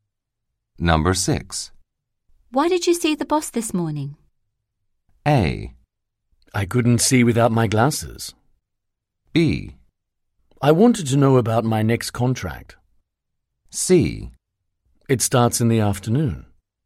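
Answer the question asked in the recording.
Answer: B: I wanted to know about my next contract.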